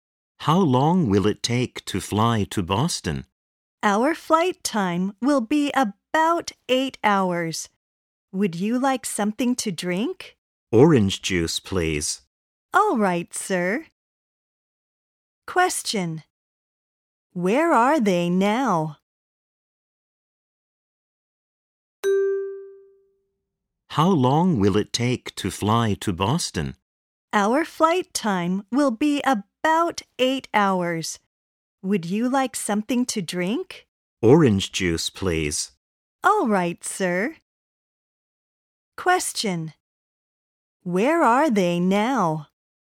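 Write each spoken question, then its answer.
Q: Where are they now?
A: On a plane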